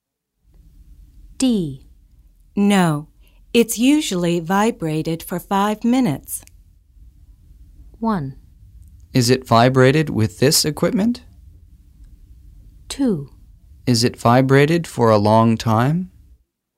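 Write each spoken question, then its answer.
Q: No, it's usually vibrated for 5 minutes.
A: 2: Is it vibrated for a long time?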